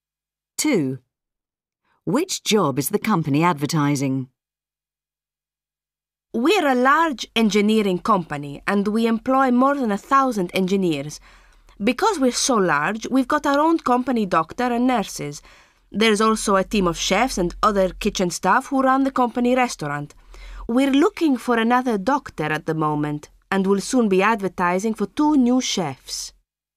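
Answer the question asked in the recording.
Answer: doctor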